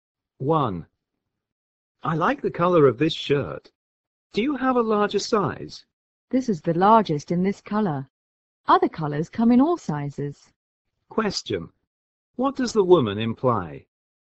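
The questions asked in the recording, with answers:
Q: What does the woman imply?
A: The shirt he wants is not available in a larger size in that color; he could choose another color.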